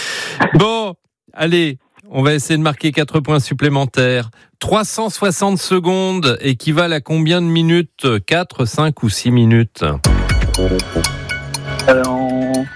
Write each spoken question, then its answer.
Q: 360 secondes équivalent à combien de minutes?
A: 360 secondes, ça fait 6 minutes.